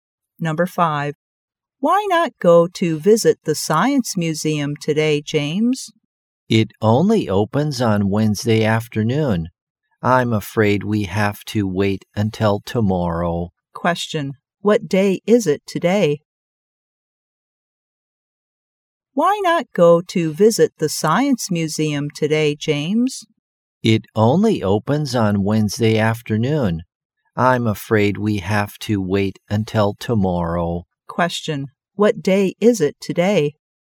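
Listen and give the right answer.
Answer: Tuesday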